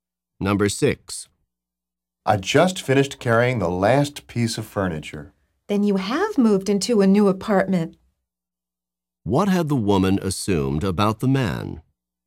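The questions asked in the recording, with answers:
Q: What had the woman assumed about the man?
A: He had not moved into a new apartment.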